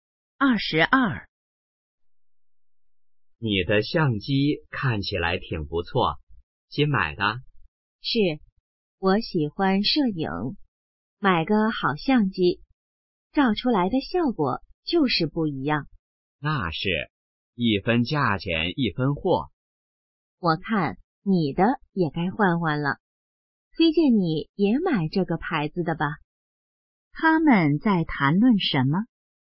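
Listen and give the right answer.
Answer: 相机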